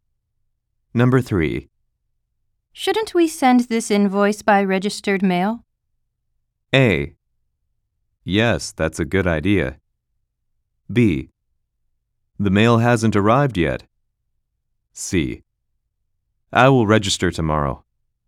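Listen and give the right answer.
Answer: A: Yes, that's a good idea.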